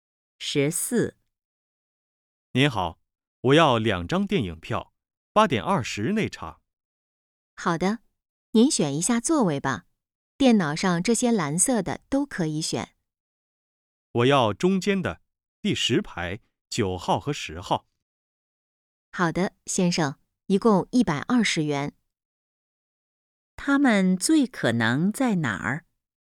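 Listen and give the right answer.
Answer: 电影院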